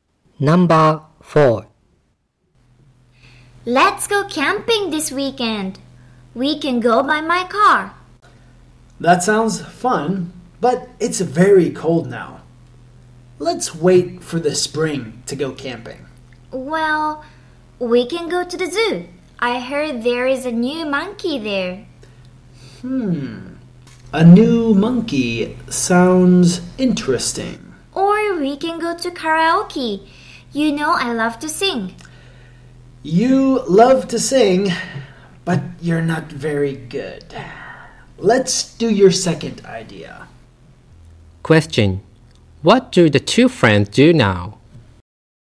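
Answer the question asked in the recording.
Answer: They go to the zoo.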